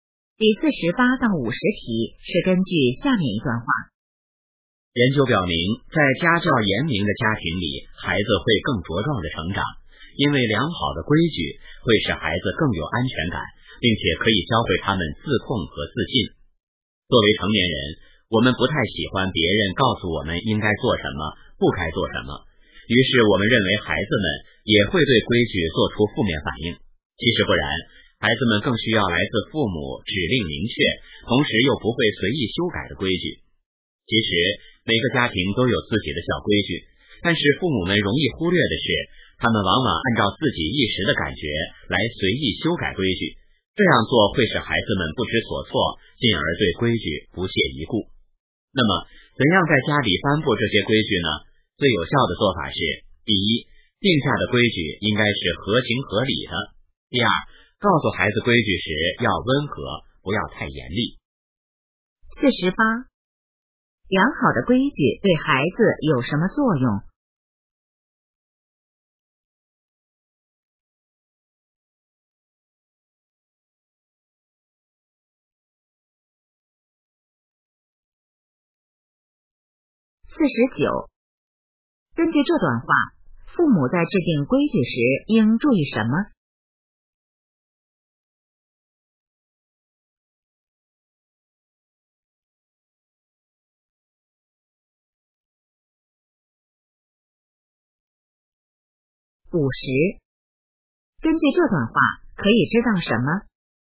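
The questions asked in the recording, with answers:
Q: 良好的规矩对孩子有什么作用?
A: 使孩子更有安全感,教会他们自控和自信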